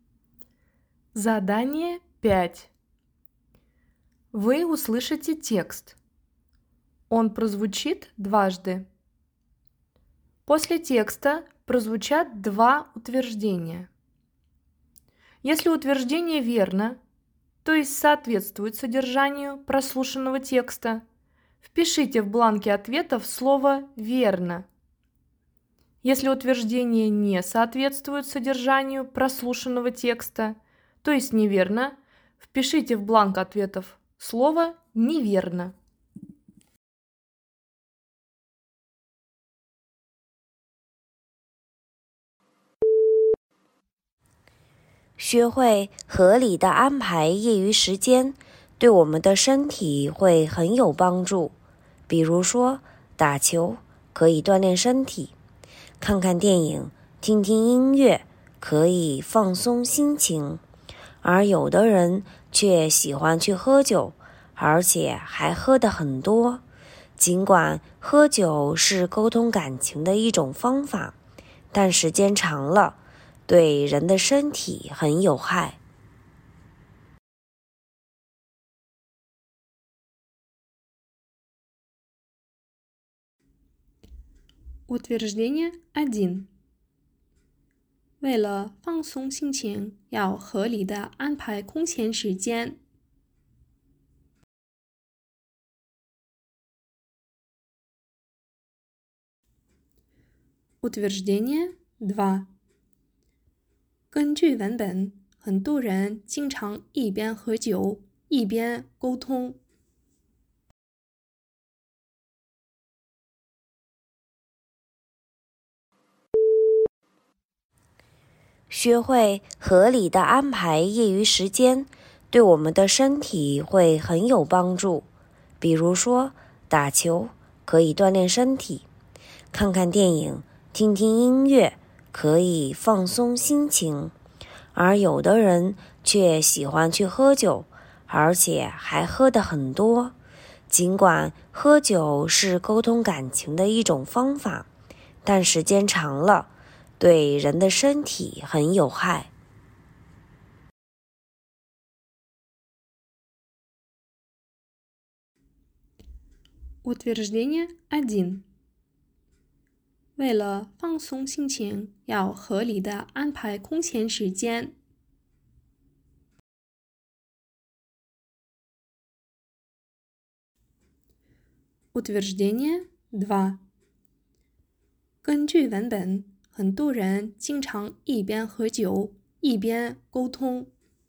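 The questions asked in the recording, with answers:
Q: 根据文本,很多人经常一边喝酒,一边沟通。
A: 错误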